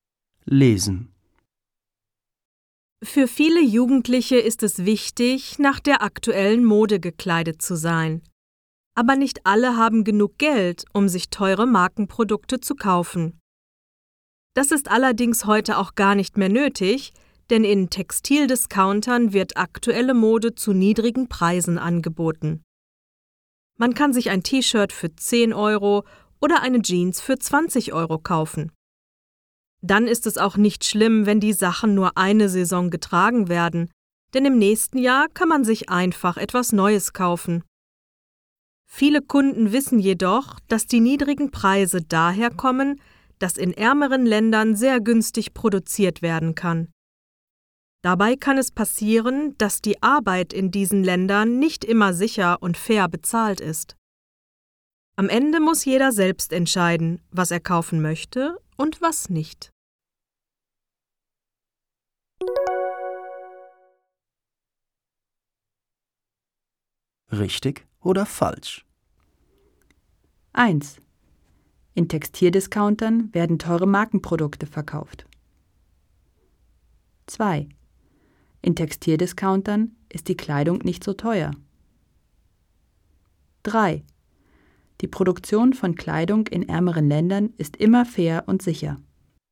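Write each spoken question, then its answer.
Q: In Textildiscountern werden teure Markenprodukte verkauft.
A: falsch

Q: In Textildiscountern ist die Kleidung nicht so teuer.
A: richtig

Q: Die Produktion von Kleidung in ärmeren Ländern ist immer fair und sicher.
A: falsch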